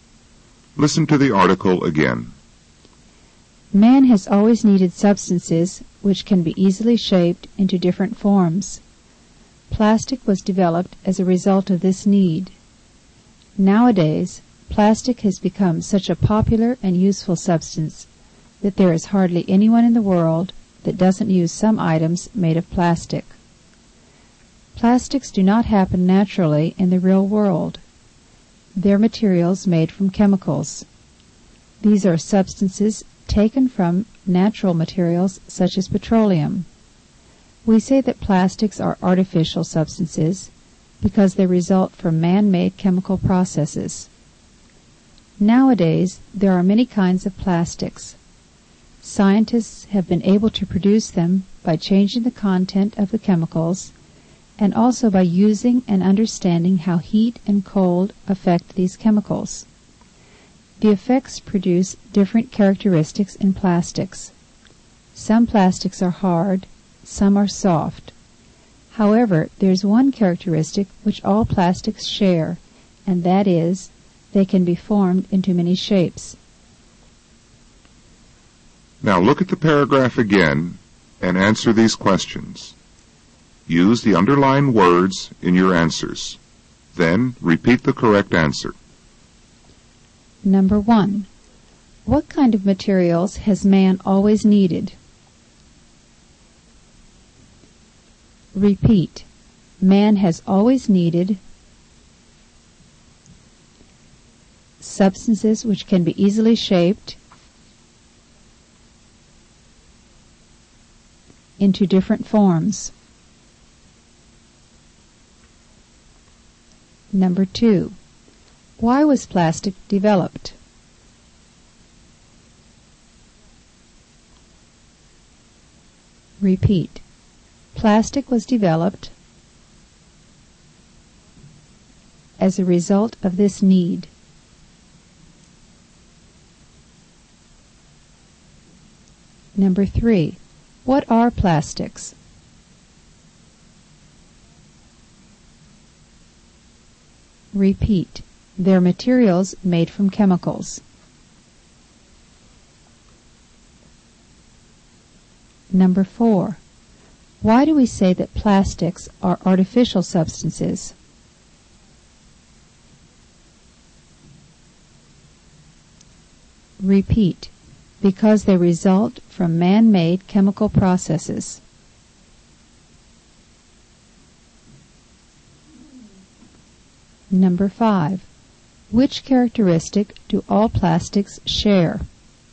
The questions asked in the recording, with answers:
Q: What kind of materials has man always needed?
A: Man has always needed substances which can be easily shaped into different forms.

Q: Why was plastic developed?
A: Plastic was developed as a result of this need.

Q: What are plastics?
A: They're materials made from chemicals.

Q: Why do we say that plastics are artificial substances?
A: Because they result from man-made chemical processes.

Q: Which characteristic do all plastics share?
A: They can be formed into many shapes.